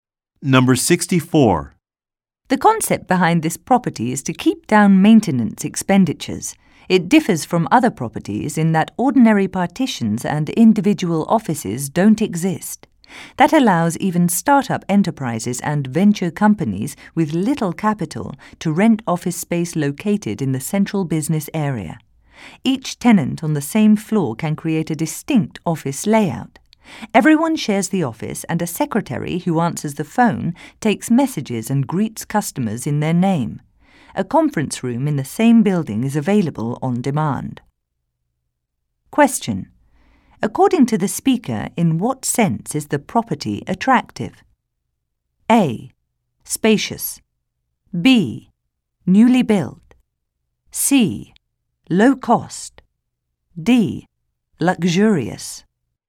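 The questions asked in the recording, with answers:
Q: According to the speaker, in what sense is the property attractive?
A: C: Low cost.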